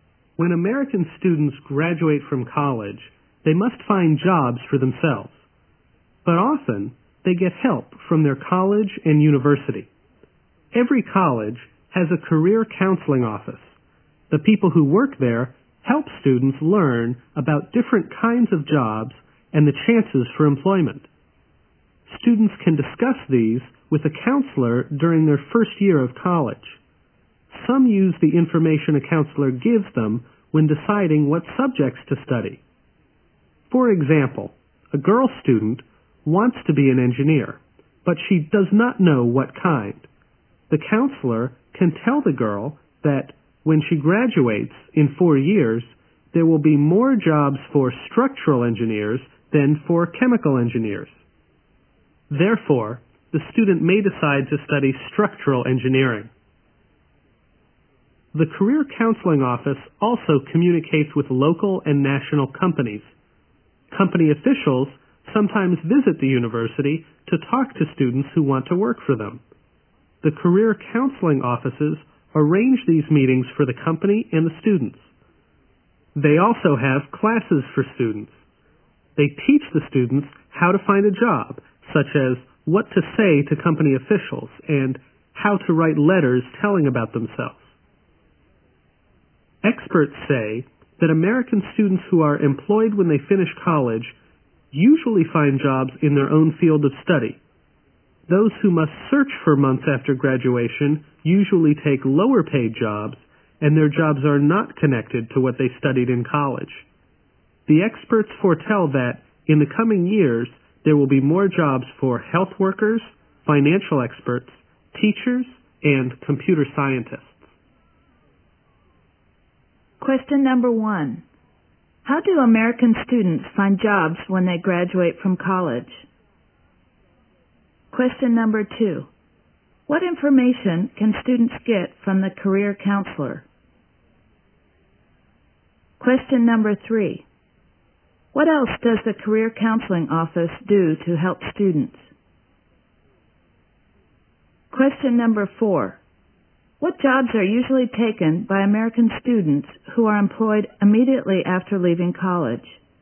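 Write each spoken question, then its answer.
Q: How do American students find jobs when they graduate from college?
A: They find jobs themselves, often with help from their college's career counseling office

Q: What information can students get from the career counselor?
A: Information about different kinds of jobs and the chances of employment

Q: What else does the career counseling office do to help students?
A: It arranges meetings with company officials and teaches classes on finding a job

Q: What jobs are usually taken by American students who are employed immediately after leaving college?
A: Jobs in their own field of study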